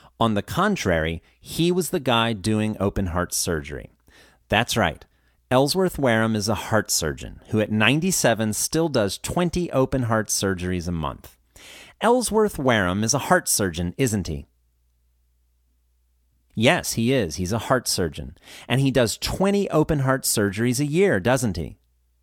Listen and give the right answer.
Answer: No, that's not correct. He does 20 open-heart surgeries a month, not a year.